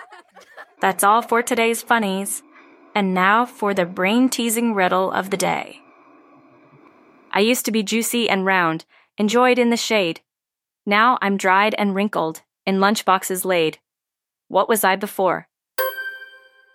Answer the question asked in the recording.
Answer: A grape.